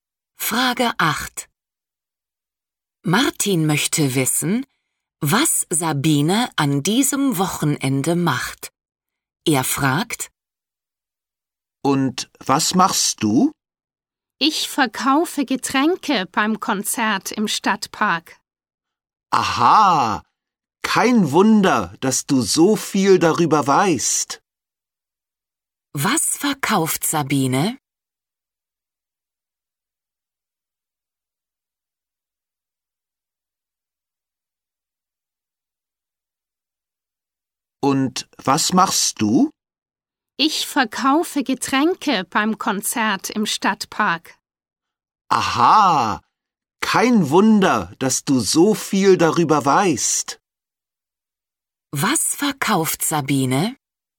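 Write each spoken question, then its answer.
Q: Was verkauft Sabine?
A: Getränke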